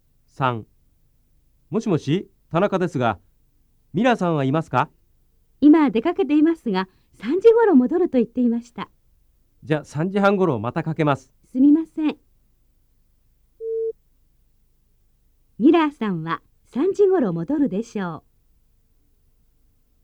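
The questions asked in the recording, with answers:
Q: ミラーさんは3時ごろ戻るでしょう。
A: ○(正しい)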